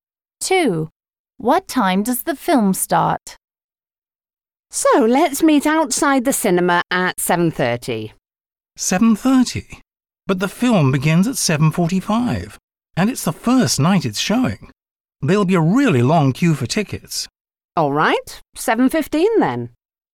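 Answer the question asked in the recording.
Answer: 7:45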